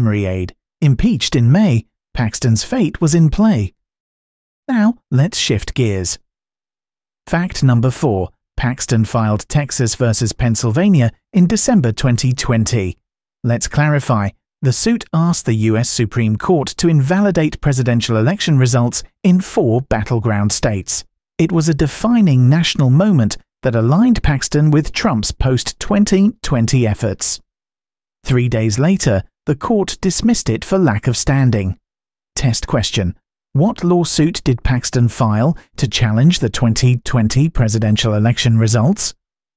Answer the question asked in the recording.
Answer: Correct answer. Texas versus Pennsylvania.